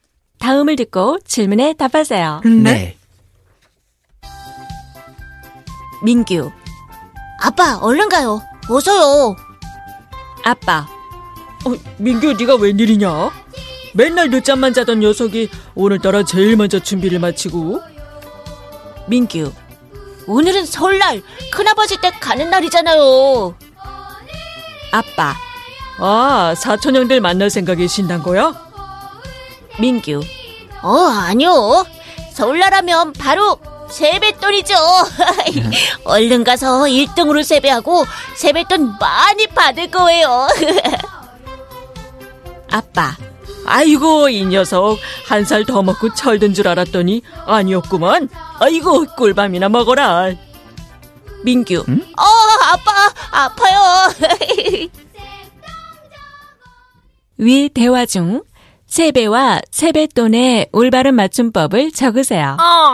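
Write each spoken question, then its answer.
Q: 위 대화 중 세배와 세뱃돈의 올바른 맞춤법을 적으세요.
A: 세배, 세뱃돈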